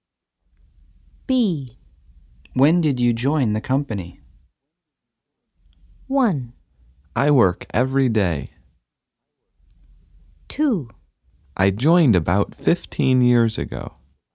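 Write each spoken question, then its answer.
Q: When did you join the company?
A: 2: I joined about 15 years ago.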